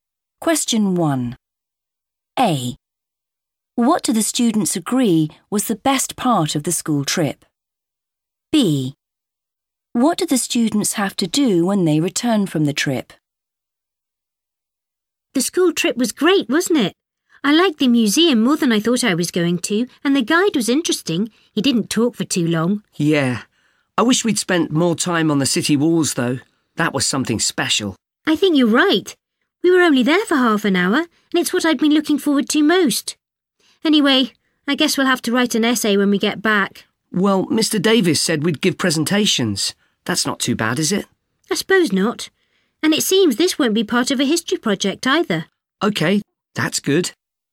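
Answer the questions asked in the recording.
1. the city walls
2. give presentations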